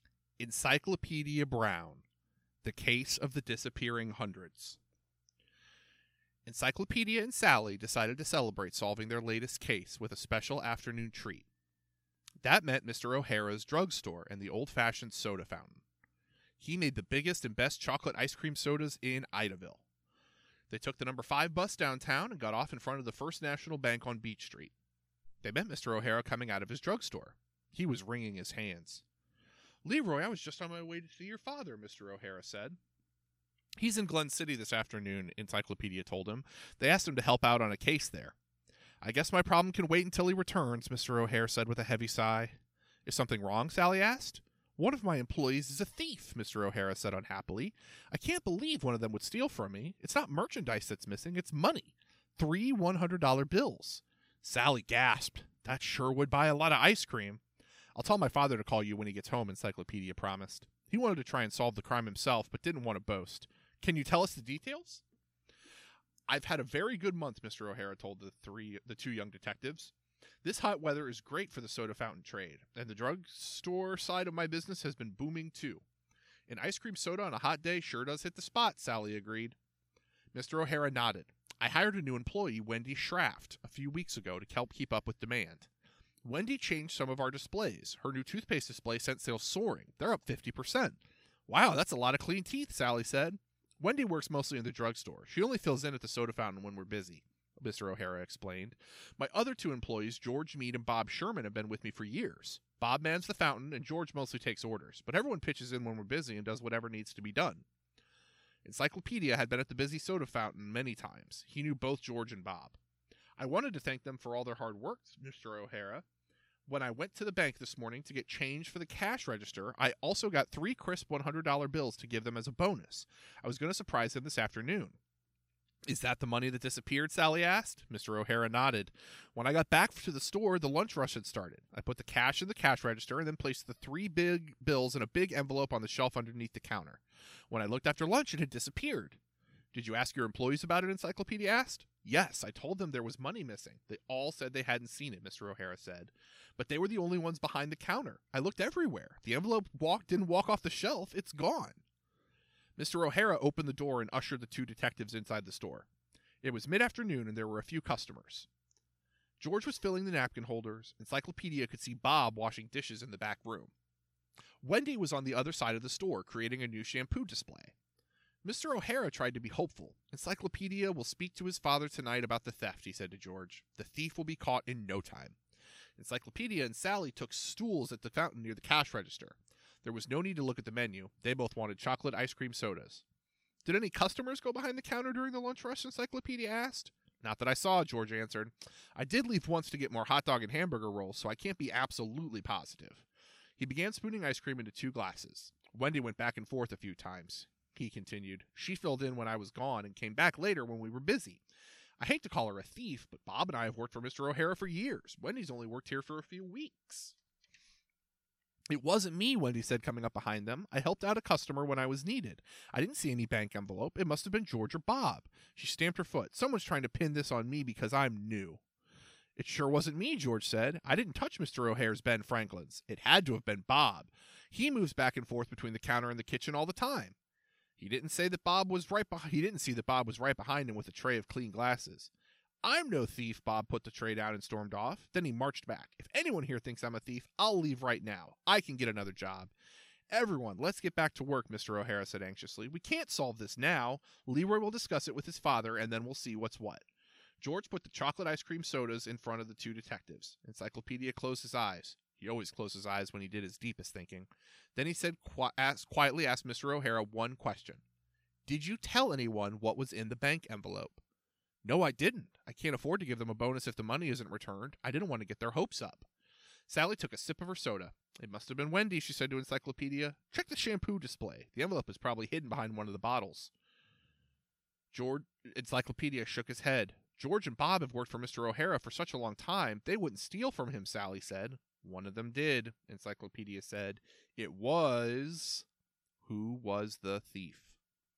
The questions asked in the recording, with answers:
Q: Who was the thief?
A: The thief was George.